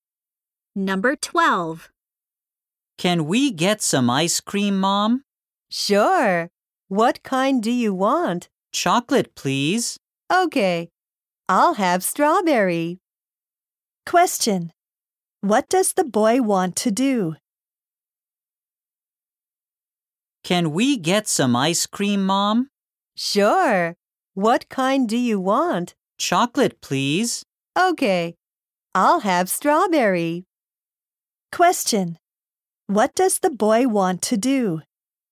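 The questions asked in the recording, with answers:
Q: What does the boy want to do?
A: Get some ice cream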